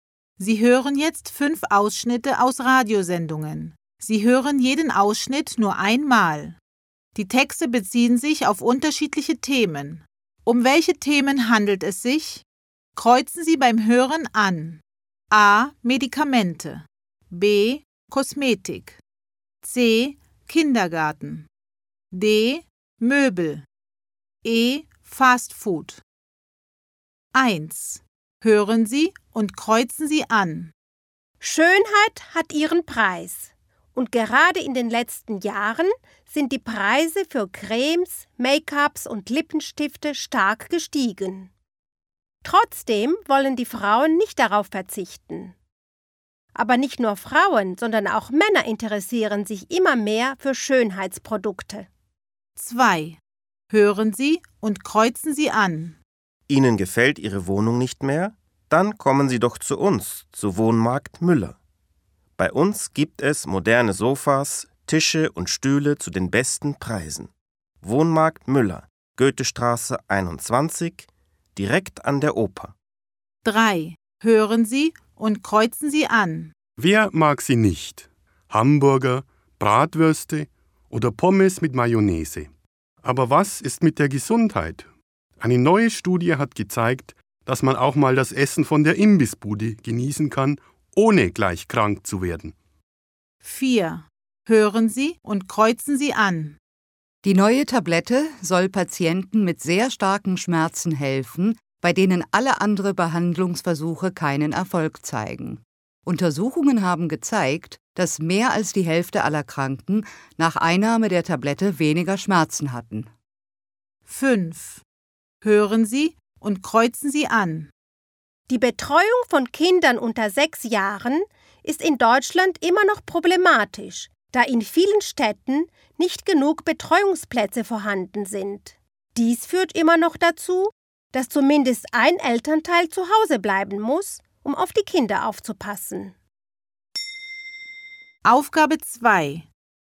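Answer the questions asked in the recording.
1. B: Kosmetik
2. D: Möbel
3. E: Fast Food
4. A: Medikamente
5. C: Kindergarten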